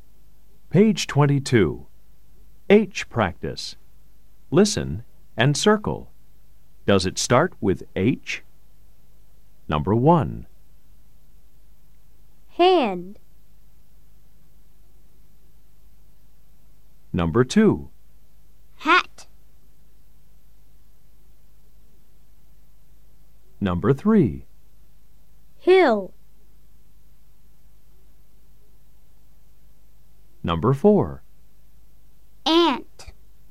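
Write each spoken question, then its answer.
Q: Does it start with H? Number 1. Hand.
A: Yes

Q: Hill.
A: Yes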